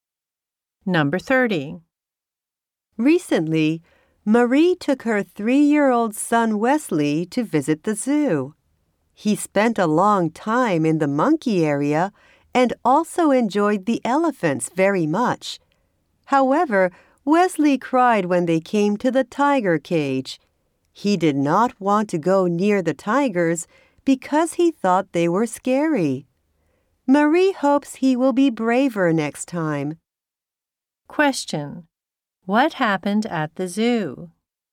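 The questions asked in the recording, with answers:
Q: What happened at the zoo?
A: Wesley cried at the tiger cage because he was scared.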